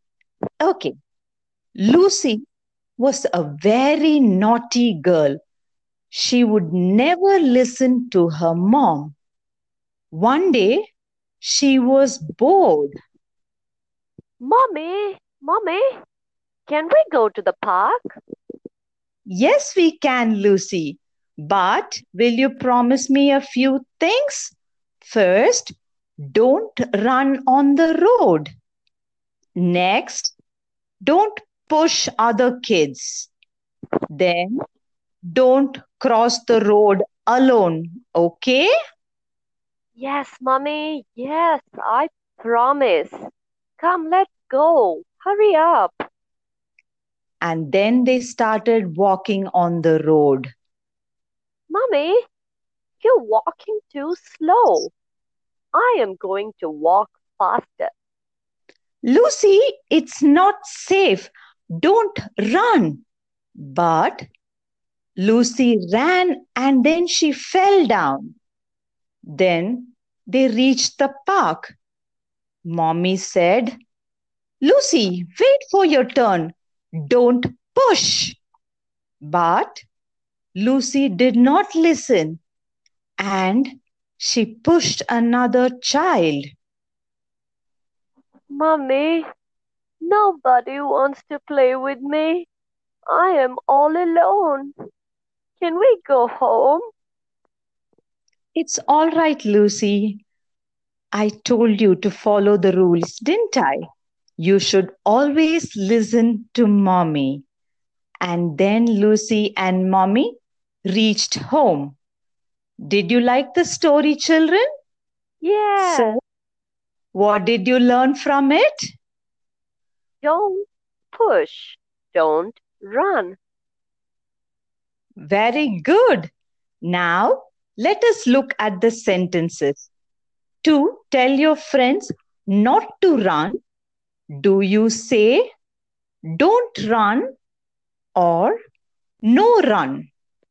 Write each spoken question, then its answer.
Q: To tell your friends not to run, do you say, don't run or no run?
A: Don't run.